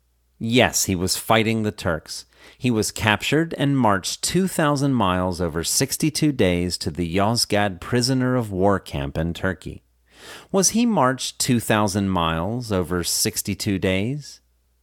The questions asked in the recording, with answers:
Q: Was he marched 2,000 miles over 62 days?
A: Yes, he was marched 2,000 miles over 62 days.